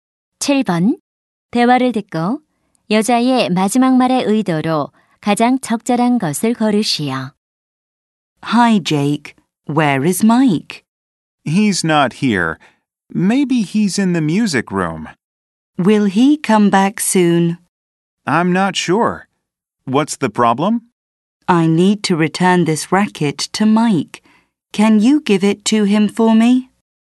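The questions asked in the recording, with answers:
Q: 대화를 듣고 여자의 마지막 말의 의도로 가장 적절한 것을 고르시오.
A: 부탁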